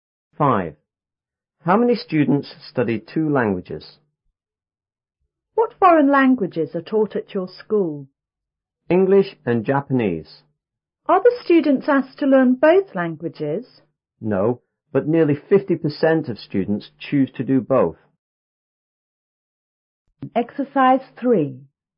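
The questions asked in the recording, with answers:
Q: How many students study 2 languages?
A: Nearly 50% of students.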